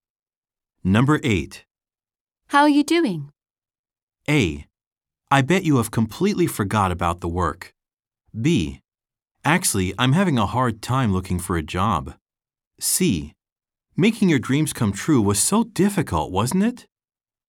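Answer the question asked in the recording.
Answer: B: Actually, I'm having a hard time looking for a job.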